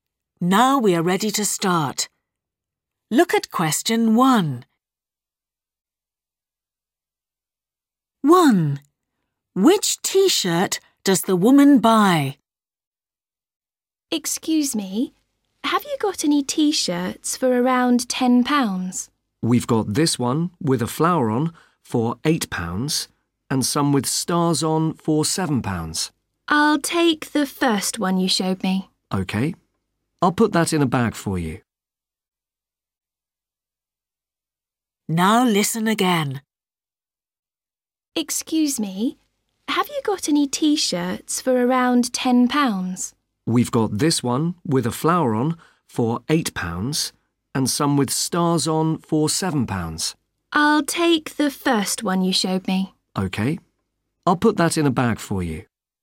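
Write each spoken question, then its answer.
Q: Which T-shirt does the woman buy?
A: The one with a flower on (£8)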